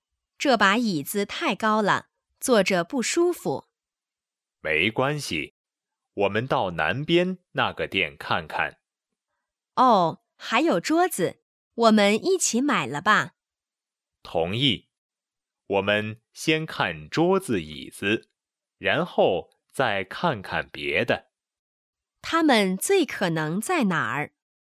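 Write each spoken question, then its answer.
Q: 他们最可能在哪儿?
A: 商店(家具店)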